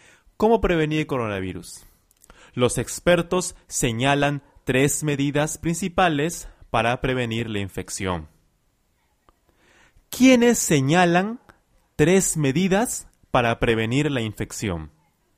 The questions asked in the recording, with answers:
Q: ¿Quiénes señalan tres medidas para prevenir la infección?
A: Los expertos. Los expertos afirman o dicen tres medidas para evitar la infección.